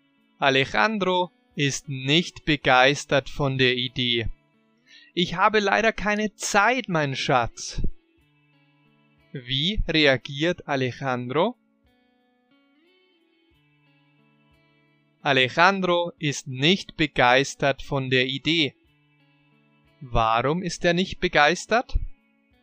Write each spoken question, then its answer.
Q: Warum ist er nicht begeistert?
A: Er sagt, er hat leider keine Zeit.